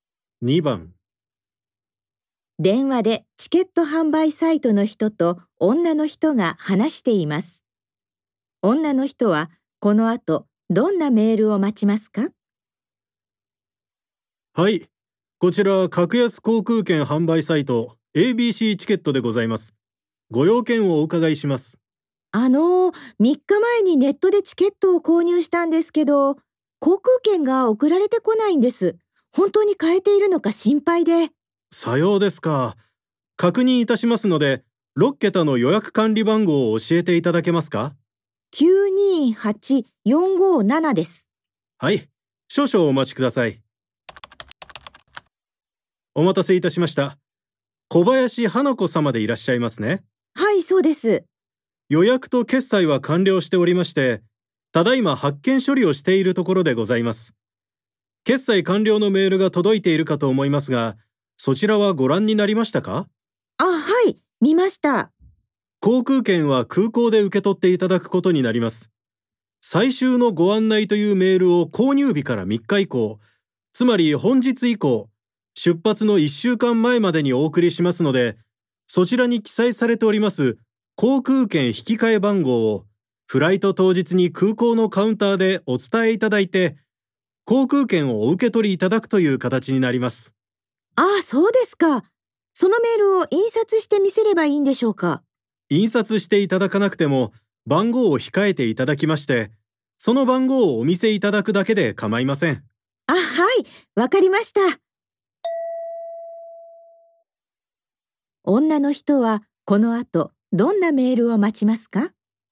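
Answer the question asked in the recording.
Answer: 航空券引き換え番号が書いてある「最終のご案内」というメール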